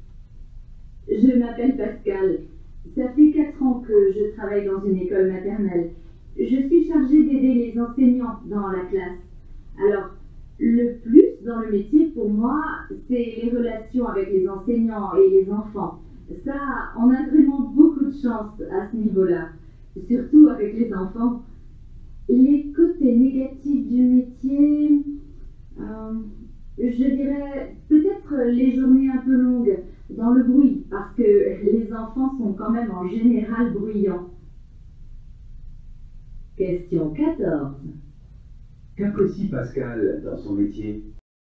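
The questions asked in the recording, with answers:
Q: Qu'apprécie Pascal dans son métier ?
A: Les relations avec les enseignants et les enfants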